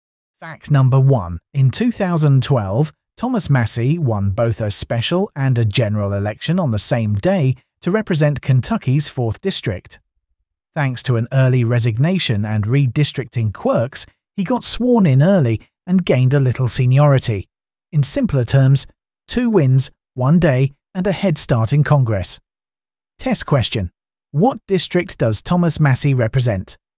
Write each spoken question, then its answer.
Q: What district does Thomas Massie represent?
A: Kentucky's 4th District.